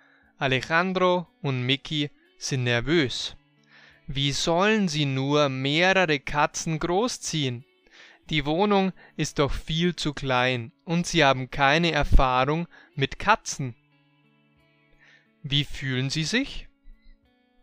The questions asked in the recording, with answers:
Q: Wie fühlen sie sich?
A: Nervös. Sie sind nervös.